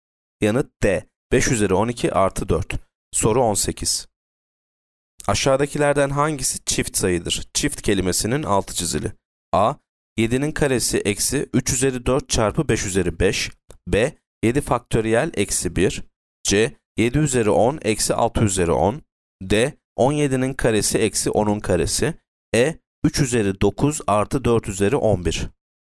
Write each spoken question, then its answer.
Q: Aşağıdakilerden hangisi çift sayıdır?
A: Yanıt A. 7'nin karesi eksi 3 üzeri 4 çarpı 5 üzeri 5.